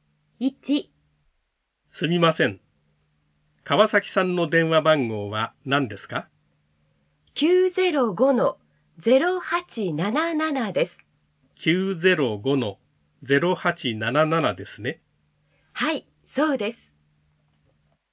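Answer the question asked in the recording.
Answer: 905-0877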